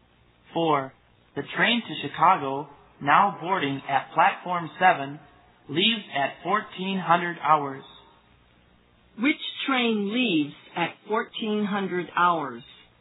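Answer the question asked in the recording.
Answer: The train to Chicago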